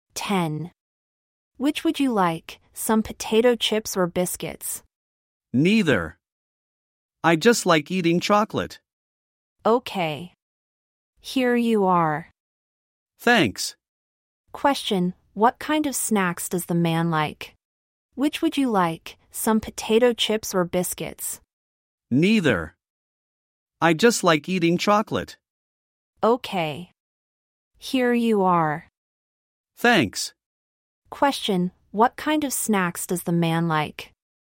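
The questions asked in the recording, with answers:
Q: Question, what kind of snacks does the man like?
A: Chocolate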